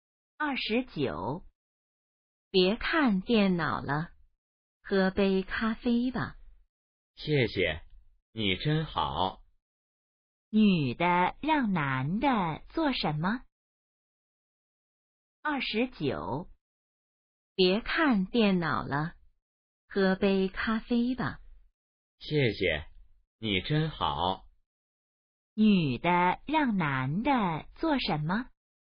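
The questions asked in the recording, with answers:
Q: 女的让男的做什么?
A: 喝咖啡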